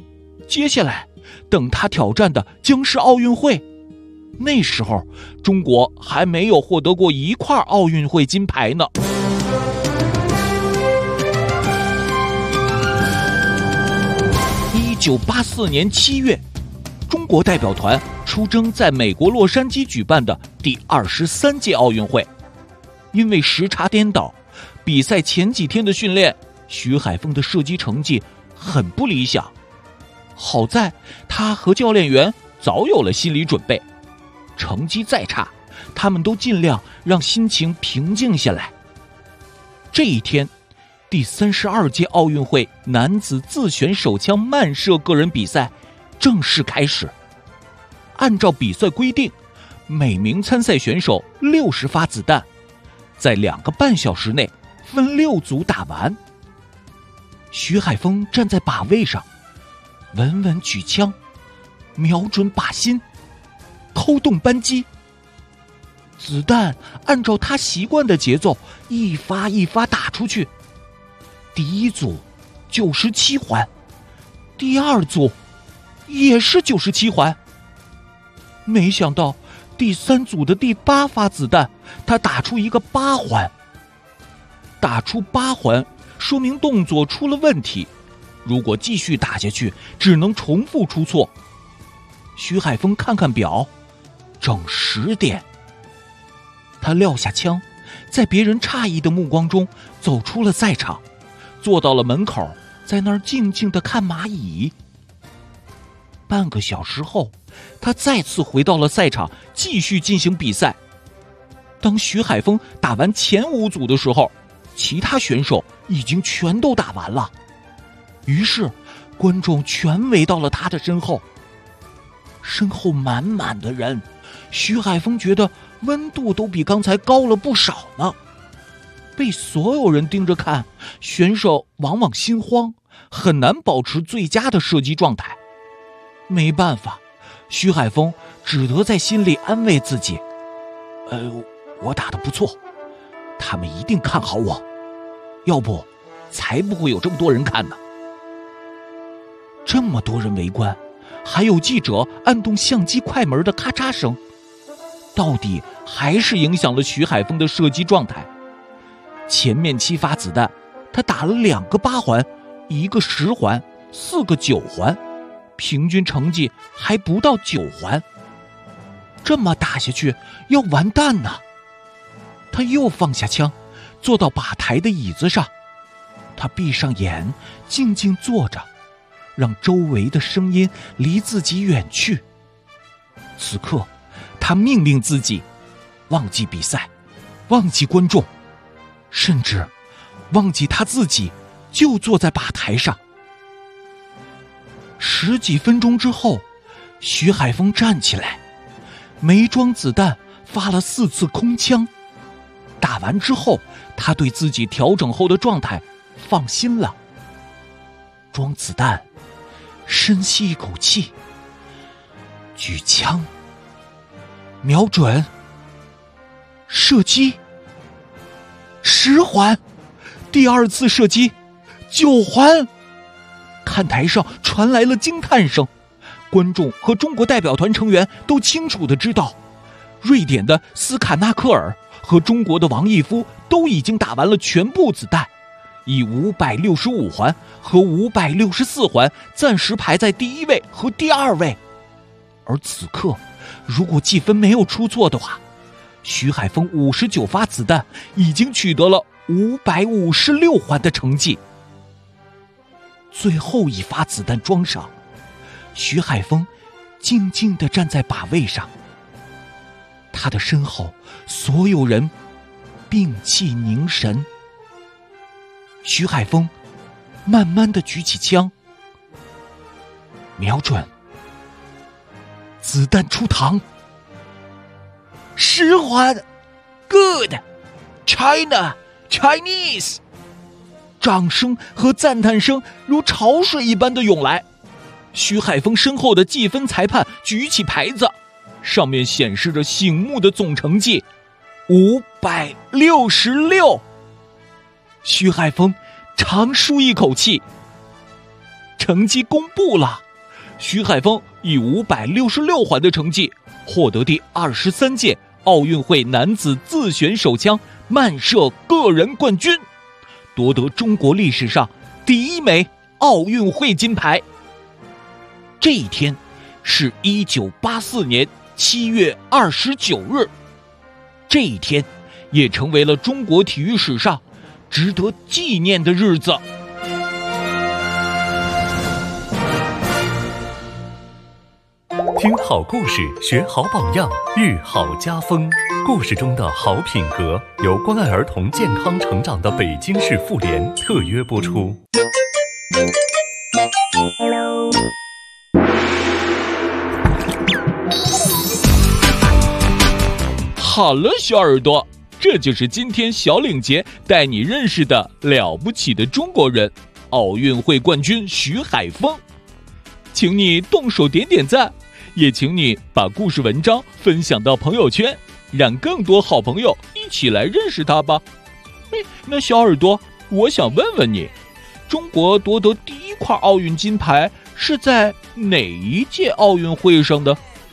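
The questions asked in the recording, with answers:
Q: 中国夺得第一块奥运金牌是在哪一届奥运会上的?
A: 第23届奥运会(1984年洛杉矶奥运会)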